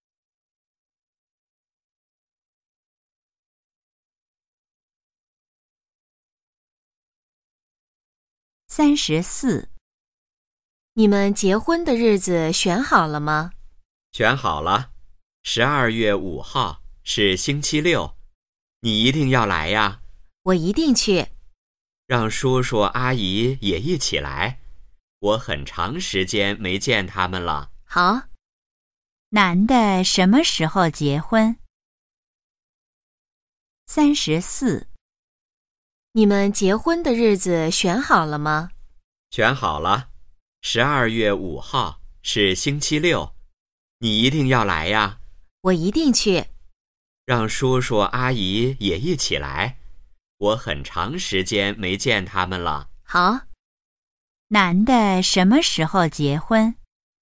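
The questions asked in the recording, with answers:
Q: 男的什么时候结婚?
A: 12月5号(星期六)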